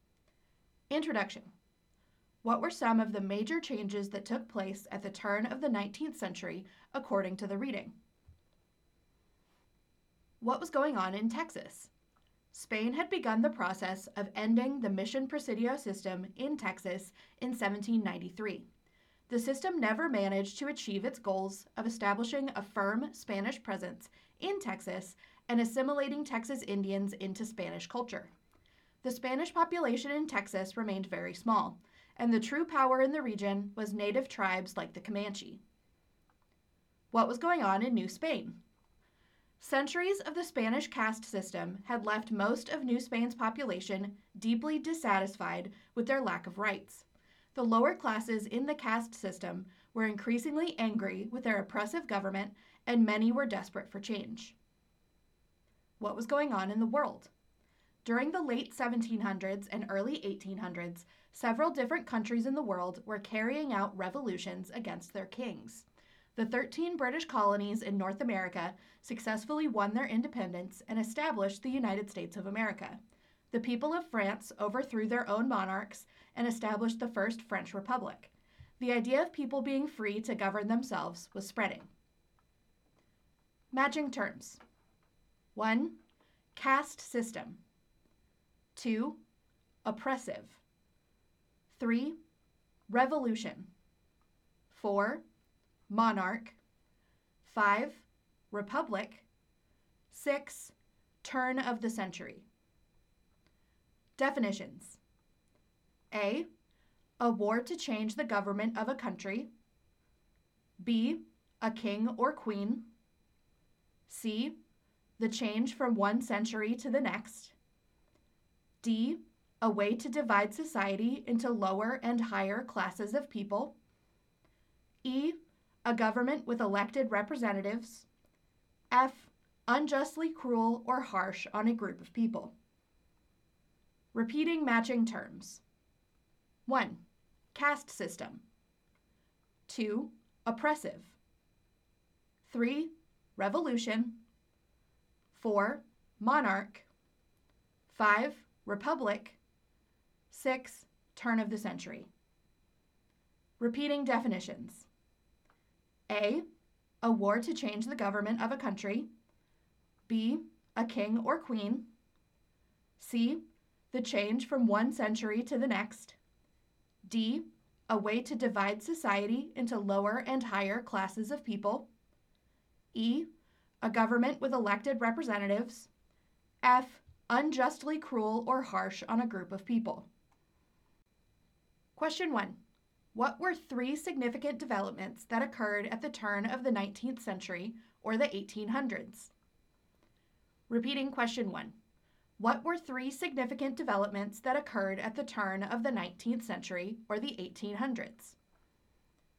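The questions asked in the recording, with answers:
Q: What were three significant developments that occurred at the turn of the 19th century or the 1800s?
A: Spain began ending the mission-presidio system in Texas; the lower classes in New Spain grew angry and wanted change; revolutions in America and France spread the idea of self-government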